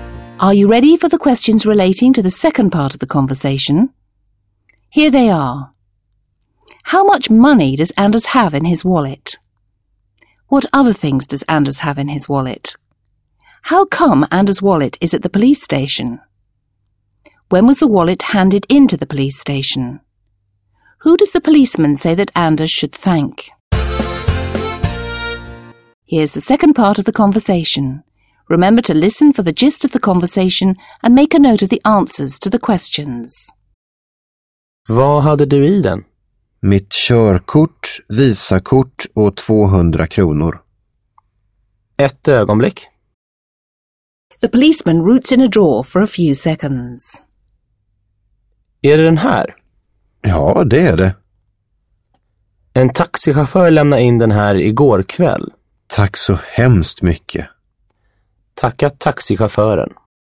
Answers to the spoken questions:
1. Anders has 200 kronor in his wallet.
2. Anders also has his driver's license and a Visa credit card in his wallet.
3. It was a taxi driver who handed in the wallet.
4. The wallet was handed in last night.
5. The policeman naturally thinks that Anders should thank the taxi driver.